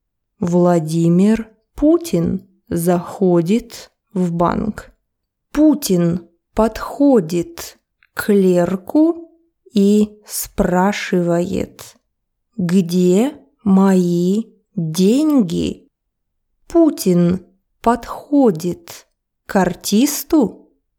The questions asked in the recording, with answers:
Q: Путин подходит к артисту?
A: Нет, он подходит к банковскому клерку.